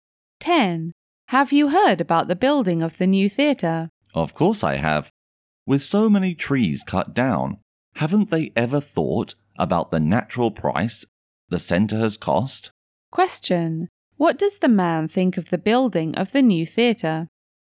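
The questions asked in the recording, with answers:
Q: What does the man think of the building of the new theatre?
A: It has harmed the environment by cutting down many trees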